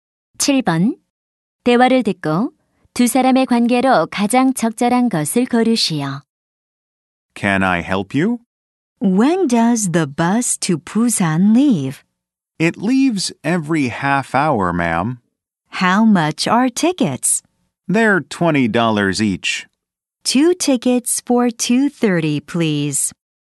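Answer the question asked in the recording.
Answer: 매표소 직원 - 승객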